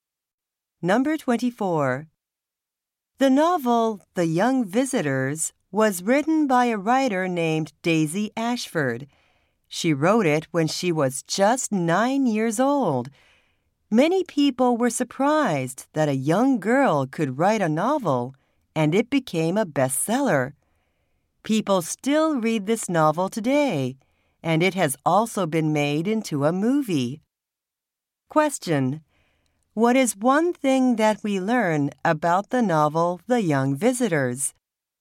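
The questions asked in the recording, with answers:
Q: What is one thing that we learn about the novel The Young Visitors?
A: It was written by a 9-year-old girl.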